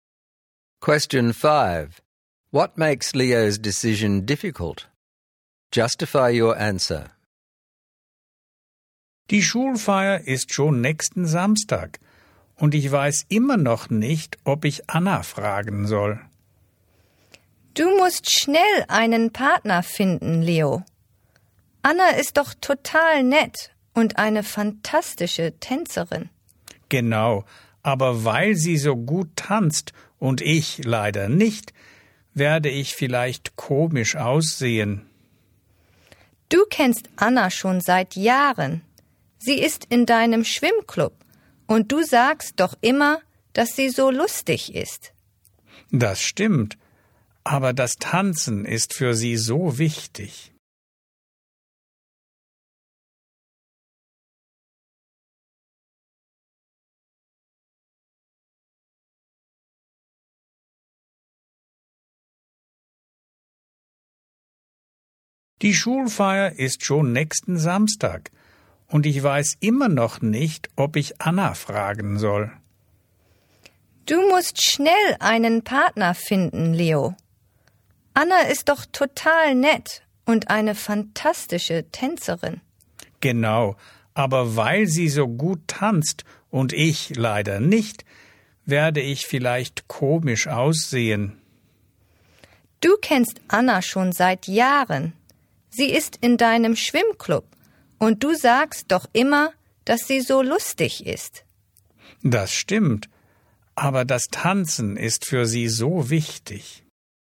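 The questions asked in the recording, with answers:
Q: What makes Leo's decision difficult?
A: Anna is a fantastic dancer and he isn't, so he might look silly, even though she is nice and fun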